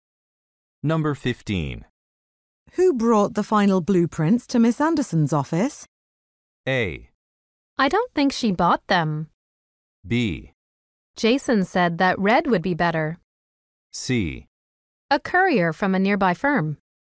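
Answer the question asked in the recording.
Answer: C: A courier from a nearby firm.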